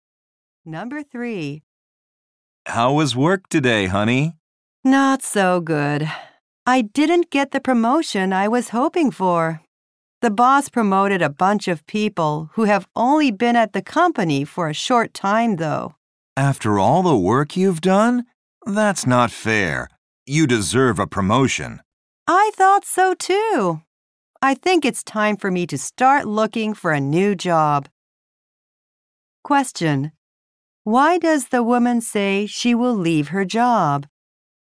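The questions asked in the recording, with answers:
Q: Why does the woman say she will leave her job?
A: She didn't get the promotion she hoped for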